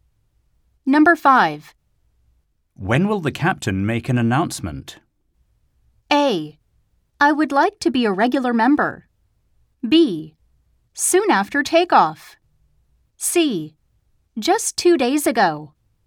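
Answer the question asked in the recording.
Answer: B: Soon after takeoff.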